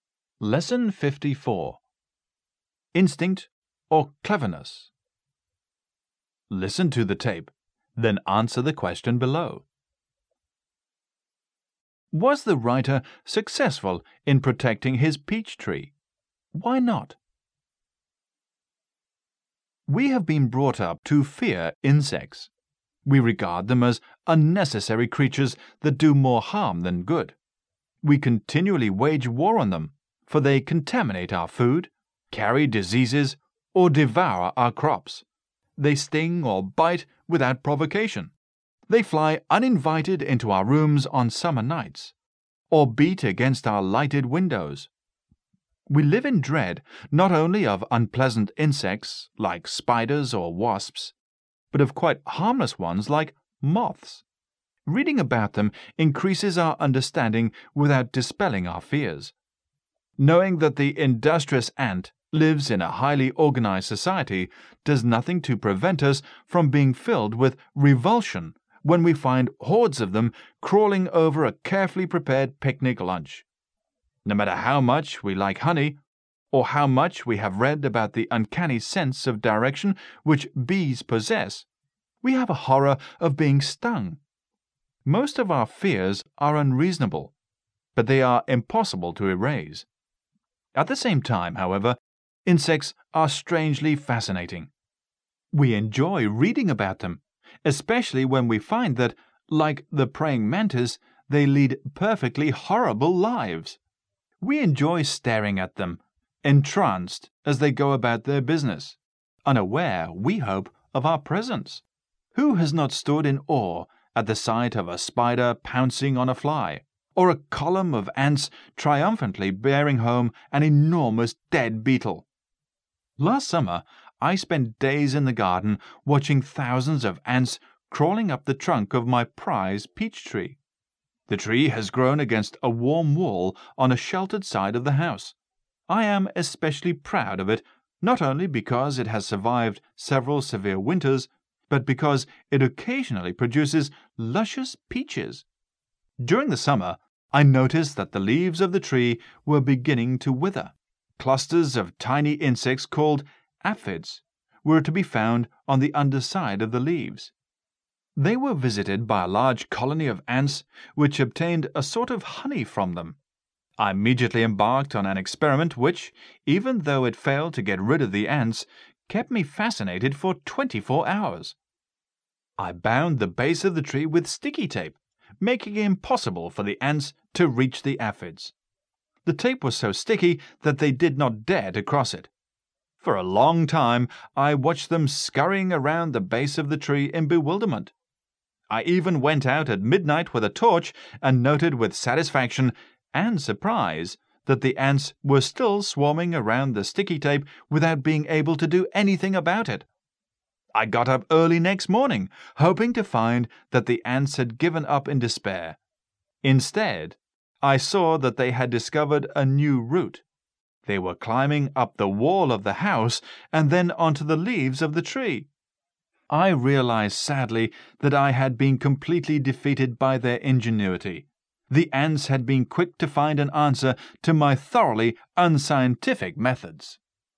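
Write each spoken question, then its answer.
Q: Was the writer successful in protecting his peach tree?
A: No

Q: Why not?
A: The ants found a new route, climbing up the house wall onto the tree's leaves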